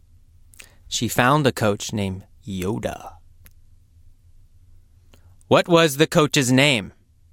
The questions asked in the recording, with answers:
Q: What was the coach's name?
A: Yoda. The coach's name was Yoda.